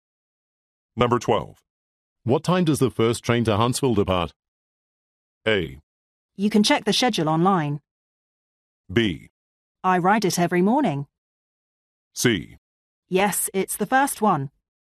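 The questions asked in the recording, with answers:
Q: What time does the first train to Huntsville depart?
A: A: You can check the schedule online.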